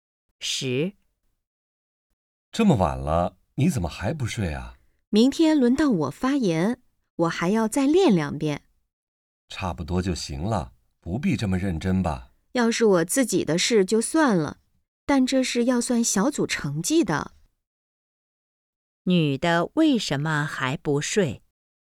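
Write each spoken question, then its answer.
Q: 女的为什么还不睡?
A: 明天要发言,还要再练习,因为关系到小组成绩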